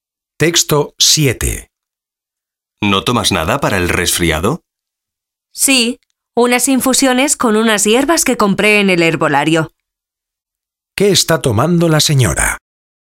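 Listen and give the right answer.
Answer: Unas infusiones de hierbas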